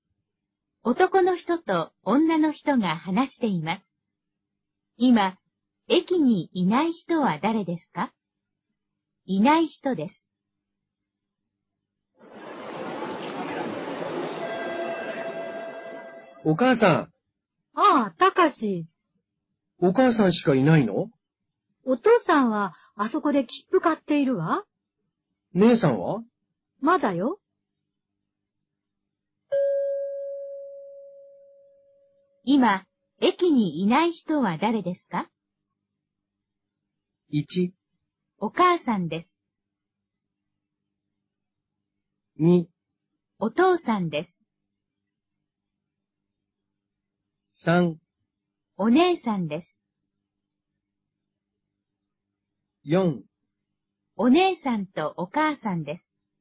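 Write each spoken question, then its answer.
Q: 今、駅にいない人は誰ですか?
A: 3: お姉さんです。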